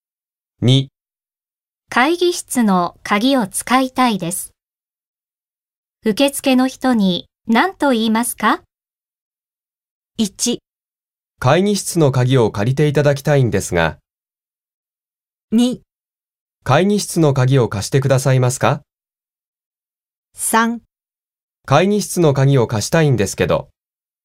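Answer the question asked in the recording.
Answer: 2: 会議室の鍵を貸してくださいますか?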